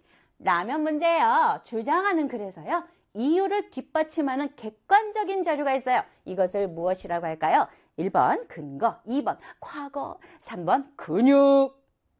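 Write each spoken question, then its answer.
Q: 이것을 무엇이라고 할까요? 1번, 근거. 2번, 과거.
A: 1: 근거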